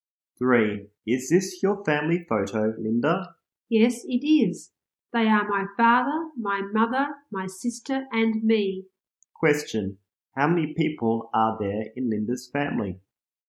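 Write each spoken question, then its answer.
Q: How many people are there in Linda's family?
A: Four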